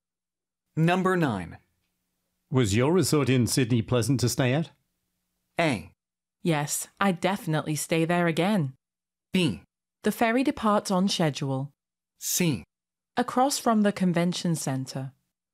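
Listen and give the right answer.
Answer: A: Yes, I'd definitely stay there again.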